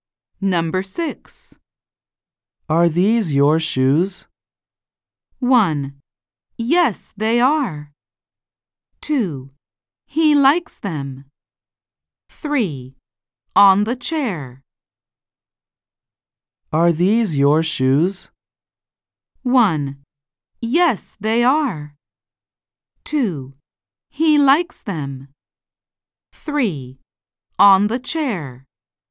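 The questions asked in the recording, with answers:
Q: Are these your shoes?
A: 1: Yes, they are.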